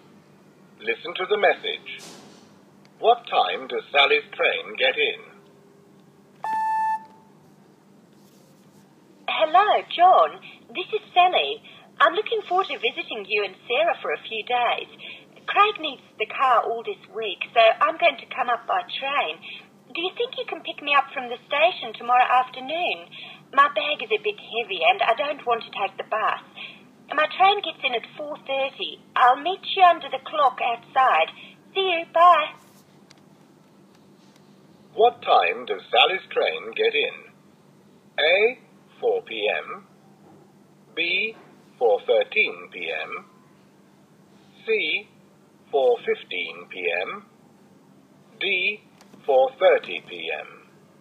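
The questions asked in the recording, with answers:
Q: What time does Sally's train get in?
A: D: 4:30 p.m.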